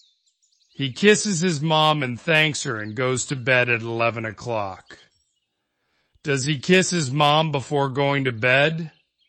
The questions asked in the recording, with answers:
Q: Does he kiss his mom before going to bed?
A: Yes, he does.